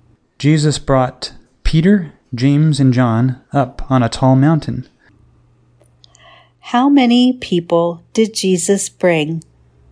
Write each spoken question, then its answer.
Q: How many people did Jesus bring?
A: Jesus brought three people.